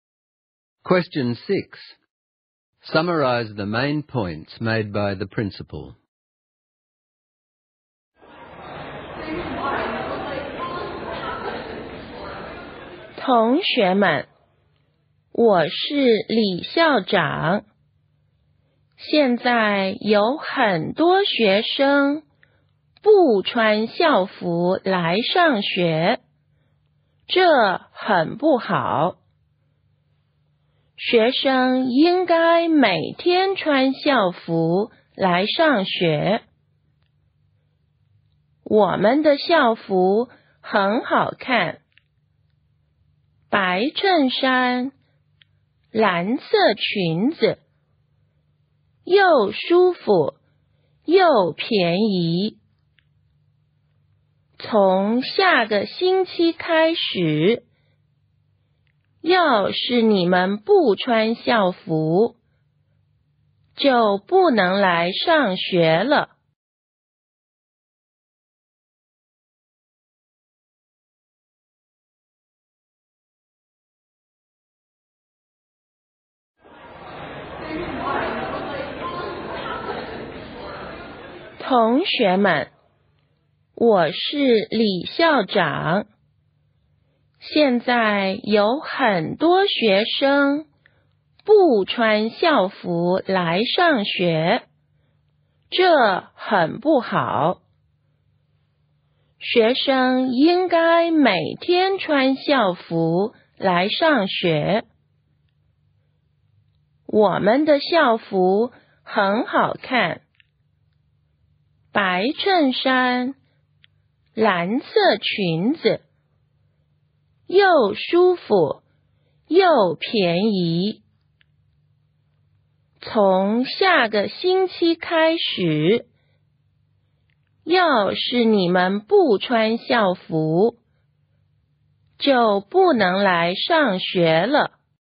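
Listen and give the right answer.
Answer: Students must wear school uniform every day; it is nice, comfortable and cheap; from next week students without uniform cannot come to school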